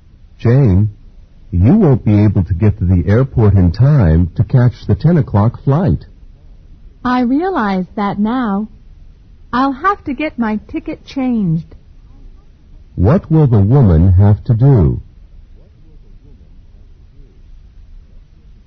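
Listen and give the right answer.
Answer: Get her ticket changed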